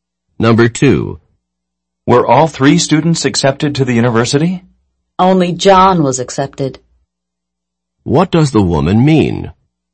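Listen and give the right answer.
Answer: Only John was accepted; the other two weren't.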